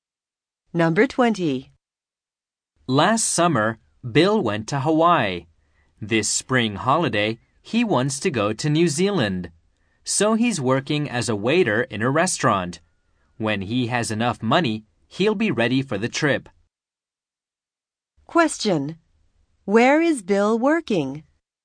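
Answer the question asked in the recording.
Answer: At a restaurant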